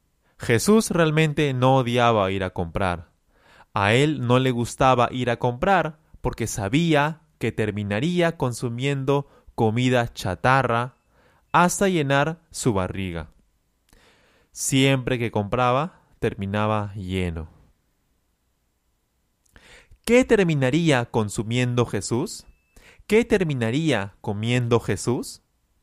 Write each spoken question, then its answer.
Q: ¿Qué terminaría consumiendo Jesús?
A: Jesús terminaría consumiendo, consumiendo comida chatarra.